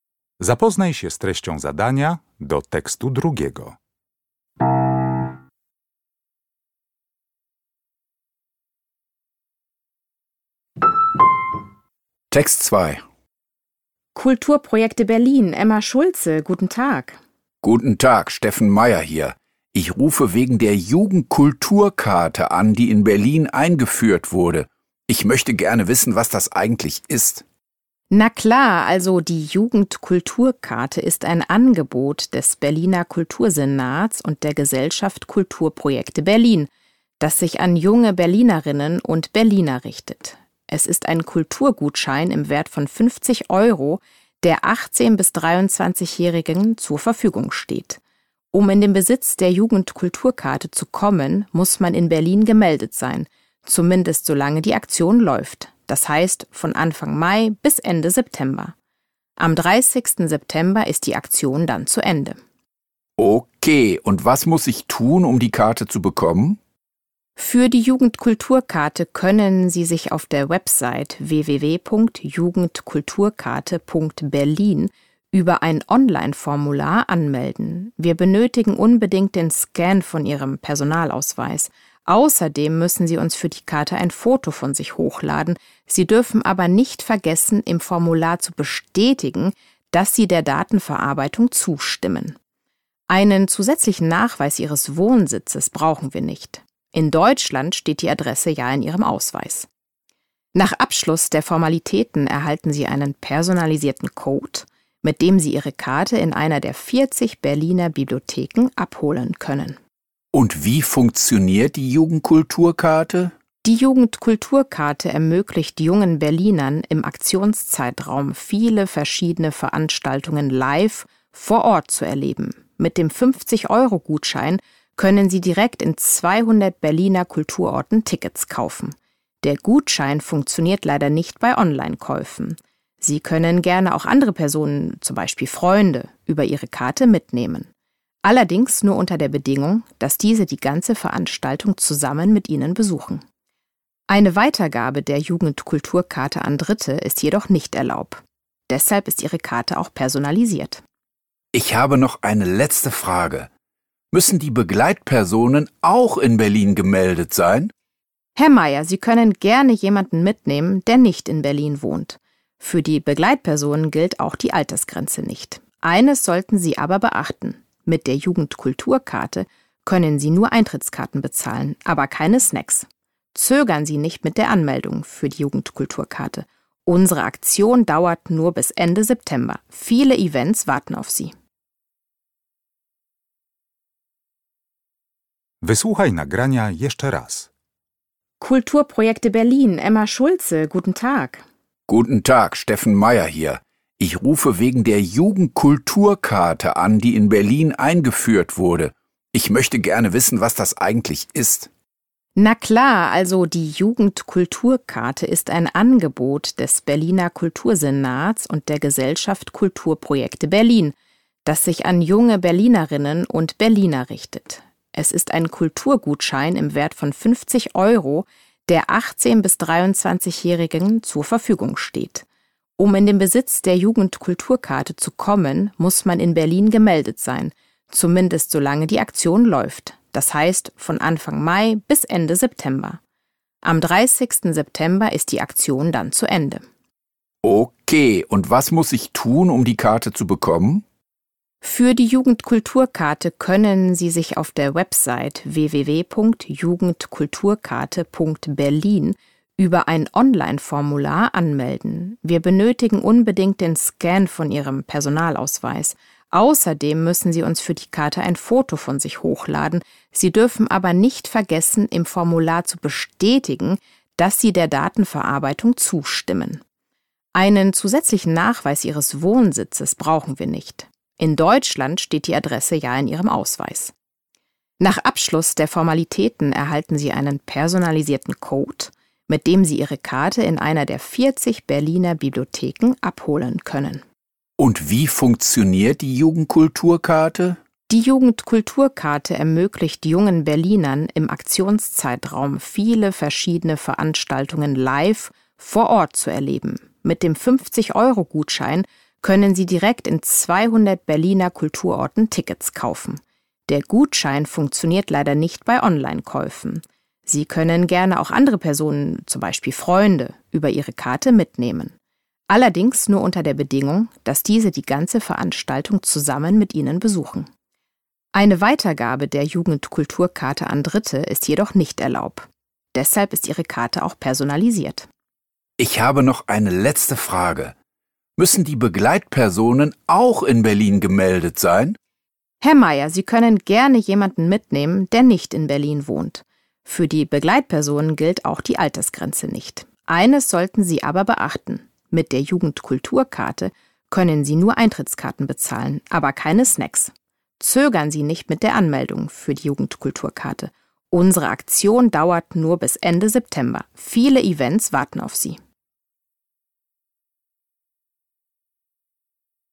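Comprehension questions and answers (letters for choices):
W zadaniach 1.3.–1.6. zaznacz jedną z liter: A, B, C albo D.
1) An wen ist die Jugendkulturkarte gerichtet?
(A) An Berlinerinnen und Berliner unter 18 Jahren.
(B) An junge Menschen, die als Touristen nach Berlin kommen.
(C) An Personen zwischen 18 und 23 Jahren mit Wohnsitz in Berlin.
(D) An junge Erwachsene, die in der Gesellschaft Kulturprojekte Berlin mitwirken.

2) Was wird bei der Registrierung für die Jugendkulturkarte nicht verlangt?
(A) Ein Foto von sich.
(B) Der Scan des Personalausweises.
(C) Eine zusätzliche Meldebestätigung.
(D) Die Zustimmung zur Datenverarbeitung.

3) Wann darf der Besitzer der Jugendkulturkarte eine andere Person zu einem Event mitnehmen?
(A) Wenn er die ganze Zeit dabei ist.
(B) Wenn er die Tickets online kauft.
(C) Wenn die andere Person in Berlin gemeldet ist.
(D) Wenn er eine zweite Karte für die Begleitperson anfordert.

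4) Welche Intention verfolgt Frau Schulze bei der Antwort auf die letzte Frage?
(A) Sie rät Herrn Meyer, sich möglichst schnell in Berlin anzumelden.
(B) Sie lädt Herrn Meyer zu einem besonderen Event im September ein.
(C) Sie schlägt Herrn Meyer vor, rechtzeitig Tickets für die Events zu besorgen.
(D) Sie empfiehlt Herrn Meyer, nicht lange mit der Registrierung für die Aktion zu warten.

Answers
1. C
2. C
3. A
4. D

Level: Poziom: rozszerzony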